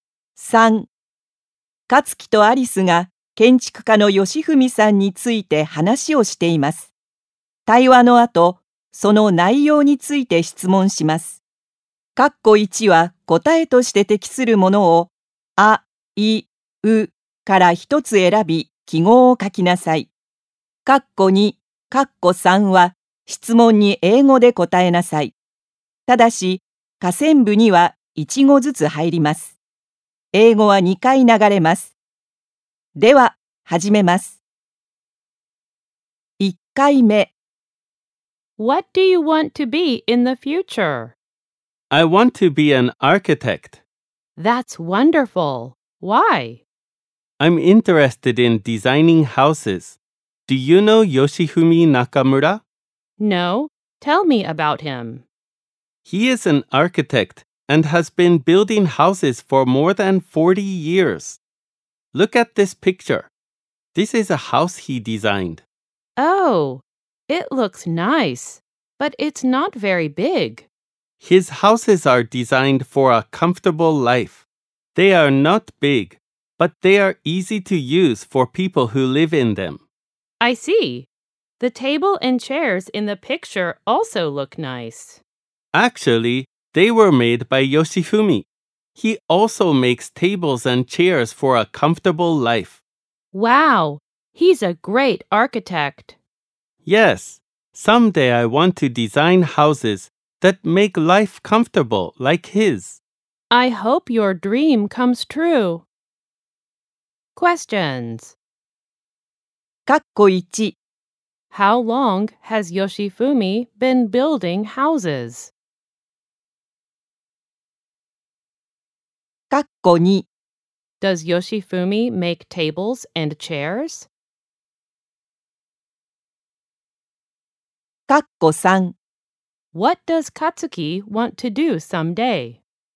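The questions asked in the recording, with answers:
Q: How long has Yoshifumi been building houses?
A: For more than 40 years

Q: Does Yoshifumi make tables and chairs?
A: Yes, he does.

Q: What does Katsuki want to do someday?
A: He wants to design houses that make life comfortable.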